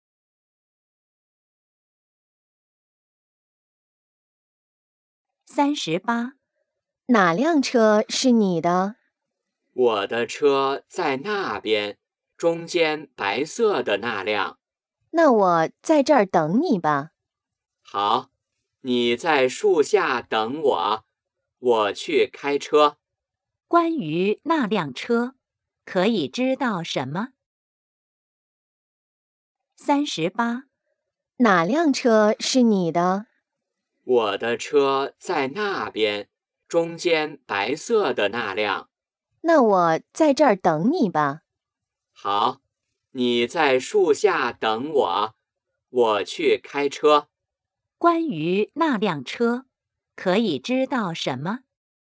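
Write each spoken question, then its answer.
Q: 关于那辆车,可以知道什么?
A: 是白色的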